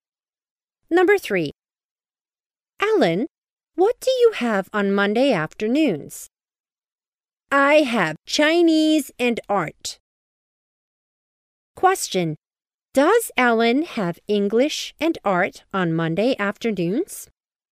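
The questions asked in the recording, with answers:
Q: Does Ellen have English and art on Monday afternoons?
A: No, she has Chinese and art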